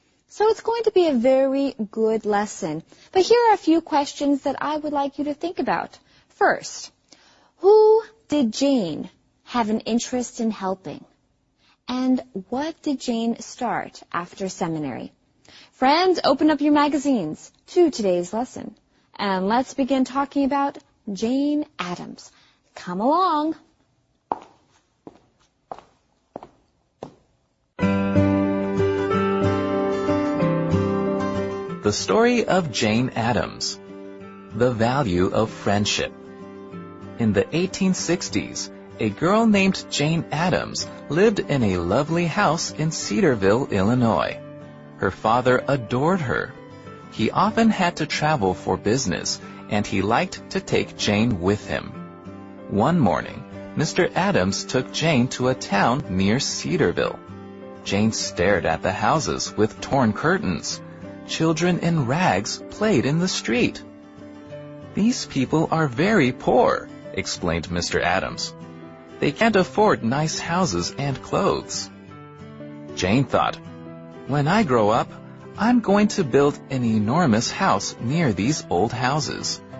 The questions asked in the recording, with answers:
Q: First, who did Jane have an interest in helping?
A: She decided she wanted to help these type of people.